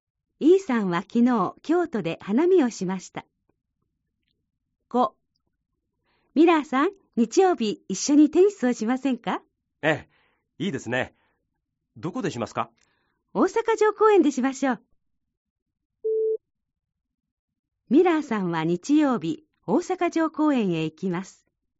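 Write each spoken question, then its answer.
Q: ミラーさんは日曜日大阪城公園へ行きます。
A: ○(正しい)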